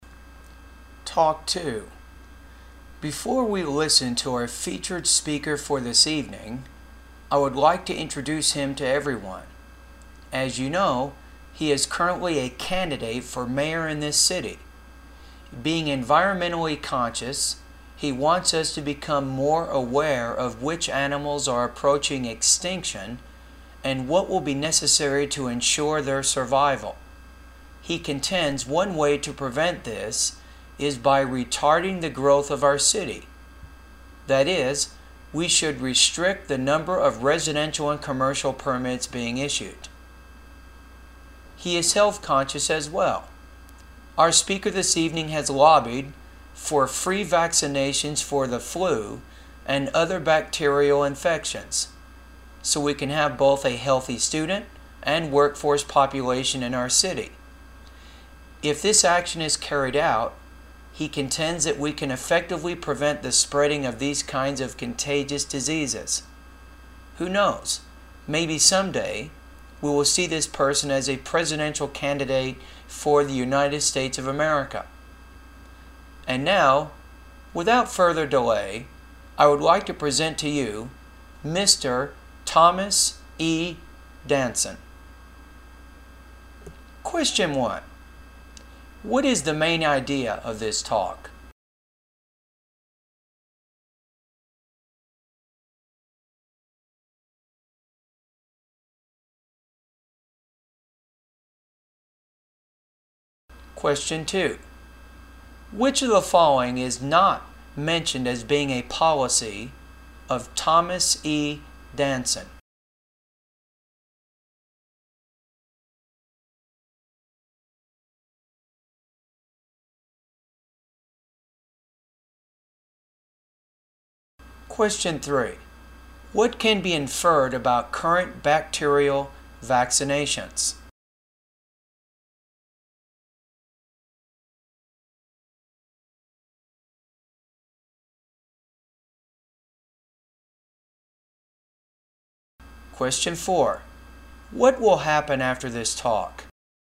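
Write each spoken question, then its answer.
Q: What is the main idea of this talk?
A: Introducing the evening's featured speaker, mayoral candidate Thomas E. Danson

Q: What will happen after this talk?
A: Thomas E. Danson will give his speech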